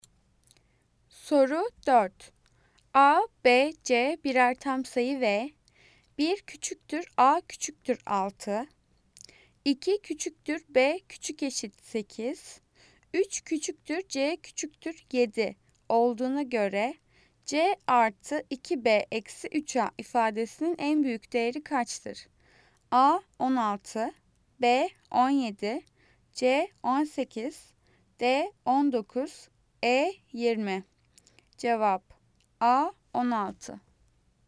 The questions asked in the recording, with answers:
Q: A, B, C birer tam sayı ve 1 küçüktür A küçüktür 6. 2 küçüktür B küçük eşit 8. 3 küçüktür C küçüktür 7 olduğuna göre C artı 2B eksi 3A ifadesinin en büyük değeri kaçtır?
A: Cevap A 16.